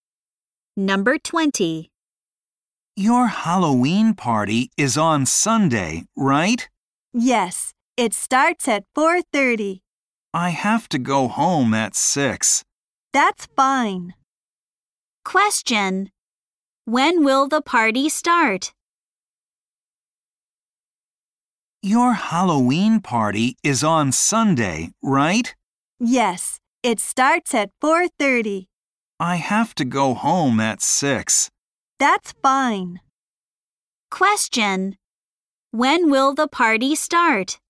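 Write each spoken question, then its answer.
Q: When will the party start?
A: At 4:30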